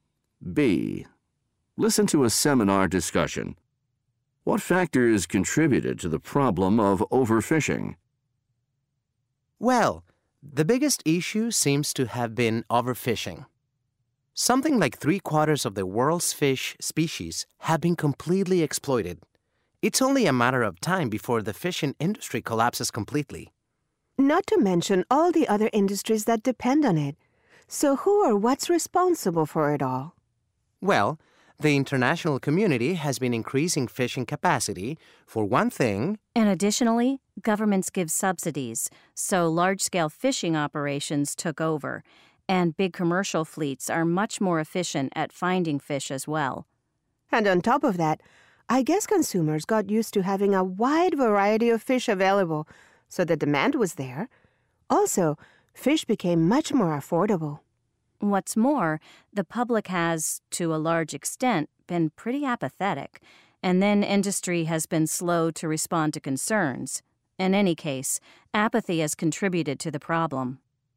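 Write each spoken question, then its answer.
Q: What factors contributed to the problem of overfishing?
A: Increased international fishing capacity, government subsidies, efficient large commercial fleets, consumer demand for a variety of affordable fish, public apathy and slow industry response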